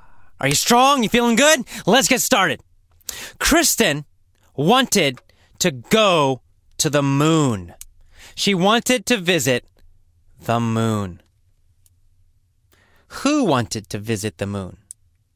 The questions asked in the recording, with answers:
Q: Who wanted to visit the moon?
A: Well, Kristen did.